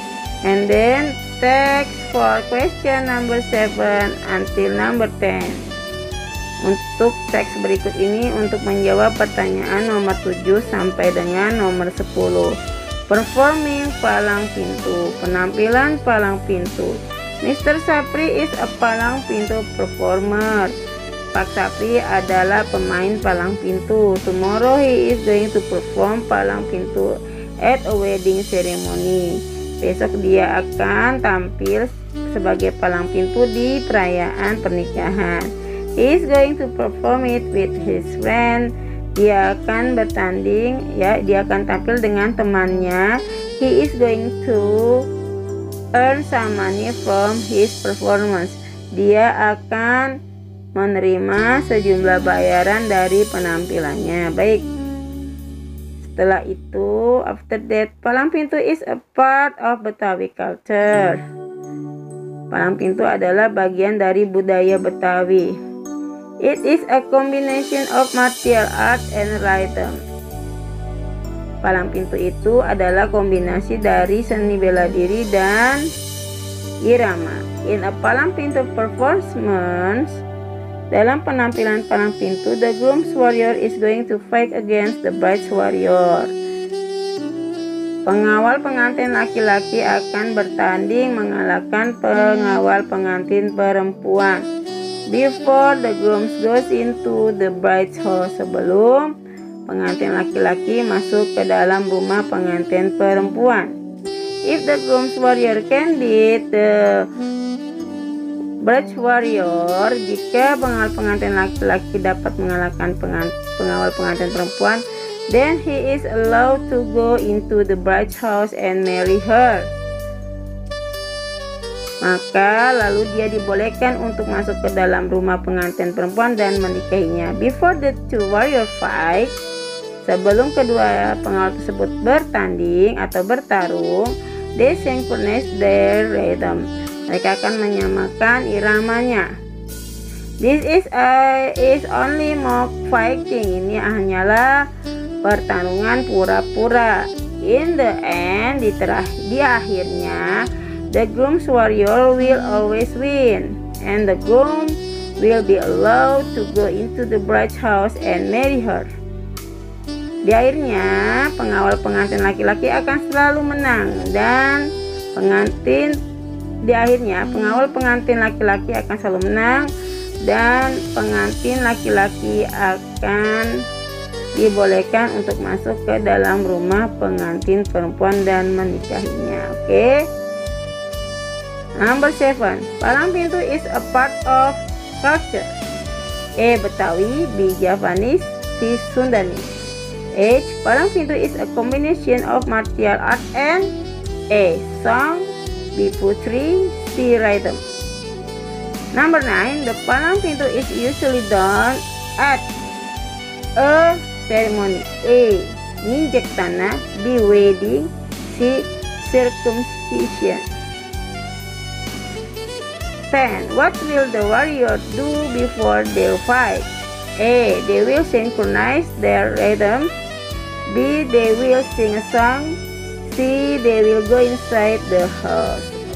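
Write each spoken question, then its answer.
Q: Palang pintu is a part of culture.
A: A: Betawi

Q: Palang pintu is a combination of martial art and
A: C: Rhythm

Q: The palang pintu is usually done at a ceremony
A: B: Wedding

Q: What will the warrior do before they fight?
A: A: They will synchronize their rhythm.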